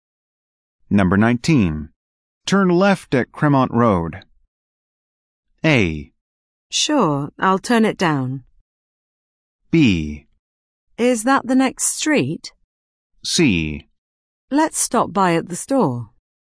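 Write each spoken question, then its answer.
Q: Turn left at Cremont Road.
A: B: Is that the next street?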